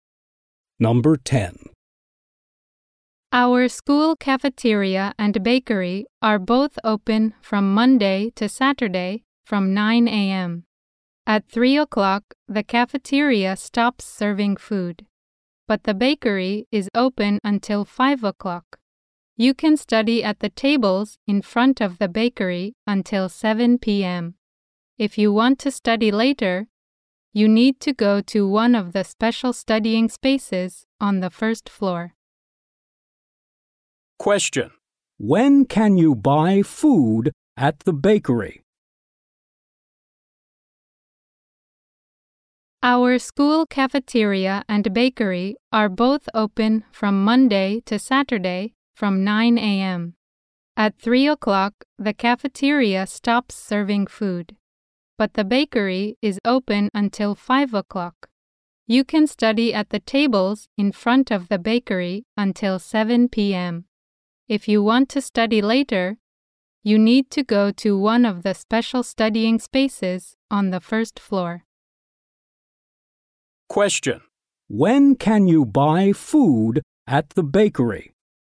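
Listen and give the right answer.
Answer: Monday to Saturday, from 9 a.m. to 5 p.m.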